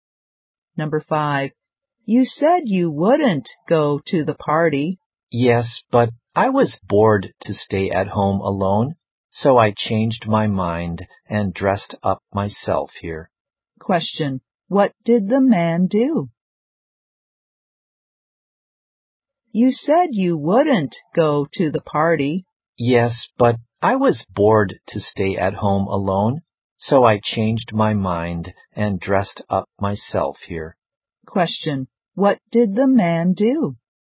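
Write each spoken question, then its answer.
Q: what did the man do?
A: He changed his mind and came to the party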